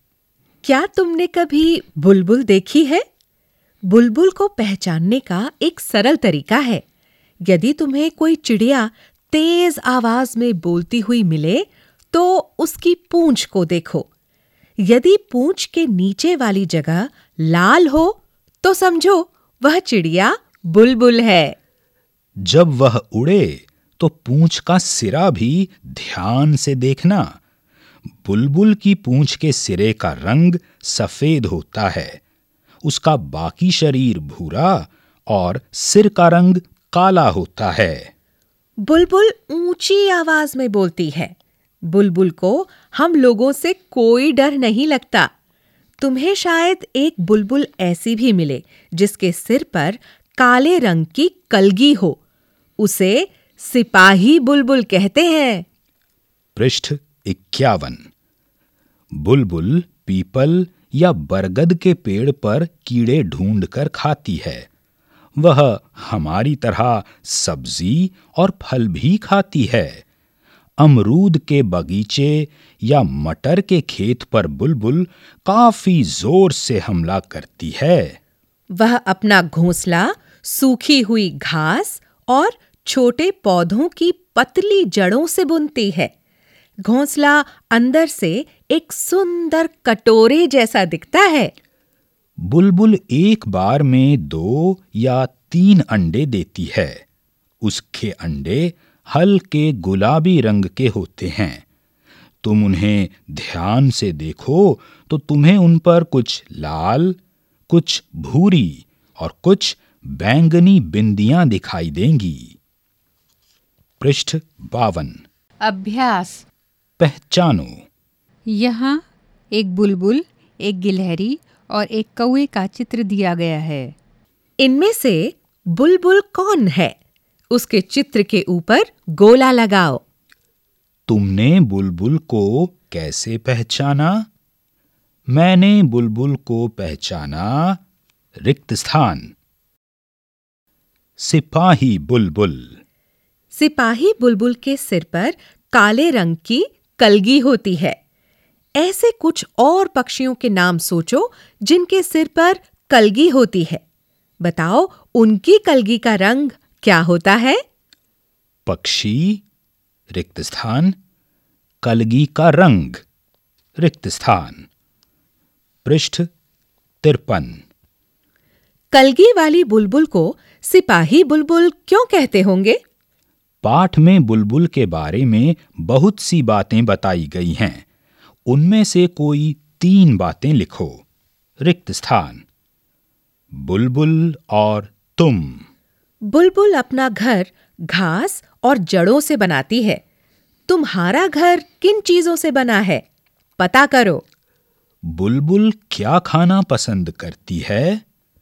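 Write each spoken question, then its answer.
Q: बुलबुल क्या खाना पसंद करती है?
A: कीड़े, सब्जी और फल (जैसे अमरूद, मटर)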